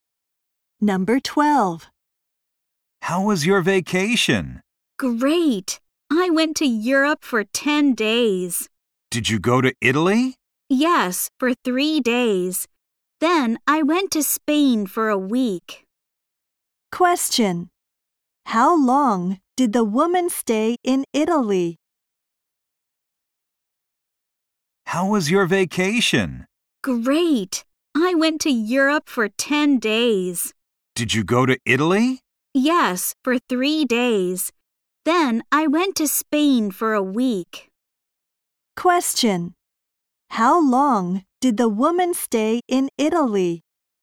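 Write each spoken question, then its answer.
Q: How long did the woman stay in Italy?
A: 3 days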